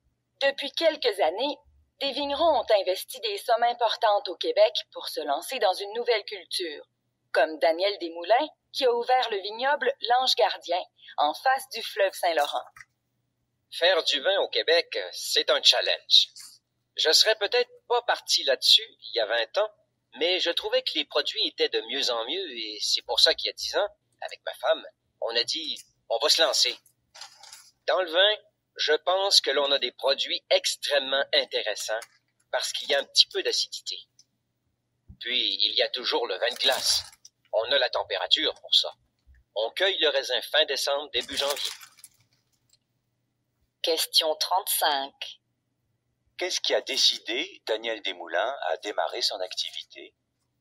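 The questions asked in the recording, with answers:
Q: Qu'est-ce qui a décidé Daniel Desmoulins à démarrer son activité?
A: La qualité des vins québécois, qui s'améliorait de plus en plus.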